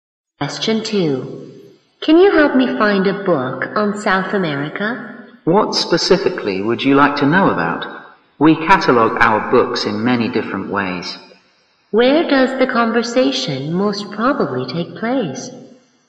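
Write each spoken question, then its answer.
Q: Where does the conversation most probably take place?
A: In a library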